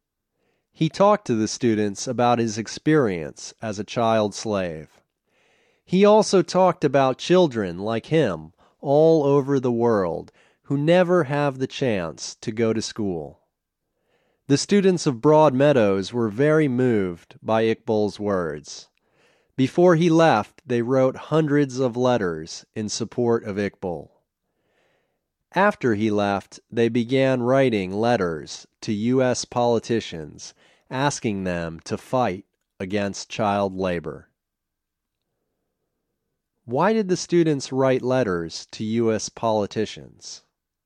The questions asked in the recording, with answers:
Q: Why did the students write letters to U.S. politicians?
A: The students wrote letters to U.S. politicians asking them to fight against child labor.